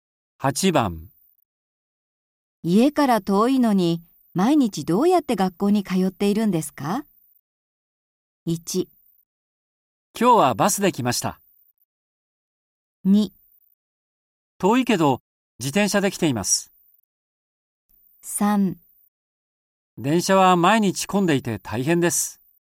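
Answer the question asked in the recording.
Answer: 2: 遠いけど自転車で来ています。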